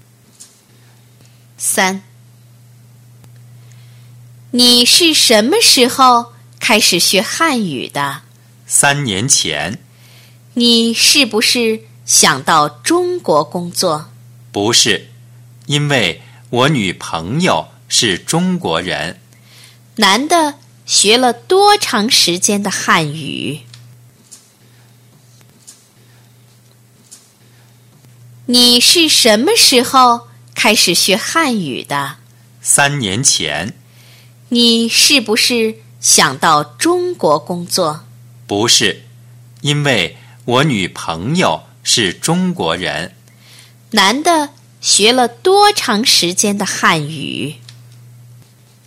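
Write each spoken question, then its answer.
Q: 男的学了多长时间的汉语?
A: 三年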